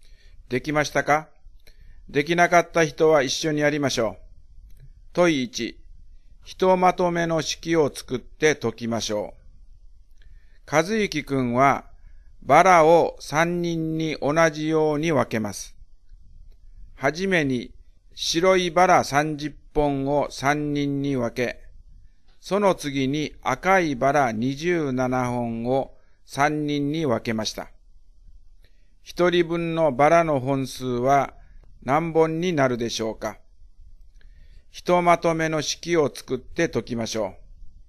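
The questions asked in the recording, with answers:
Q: 一人分のバラの本数は何本になるでしょうか?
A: 19本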